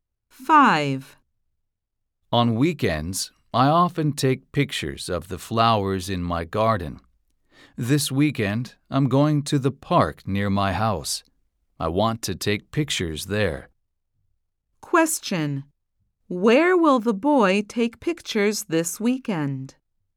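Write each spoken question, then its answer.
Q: Where will the boy take pictures this weekend?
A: In the park near his house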